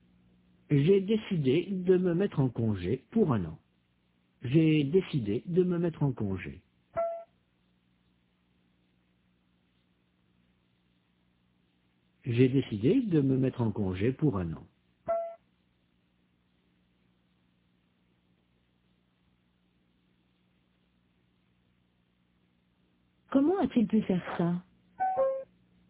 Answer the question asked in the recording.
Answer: Il s'est mis en congé pour 1 an.